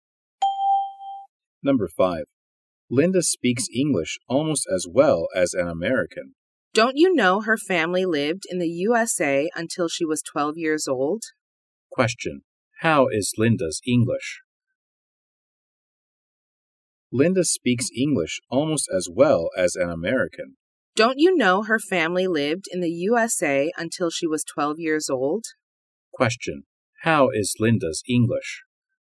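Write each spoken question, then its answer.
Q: How is Linda's English?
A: Almost as good as an American's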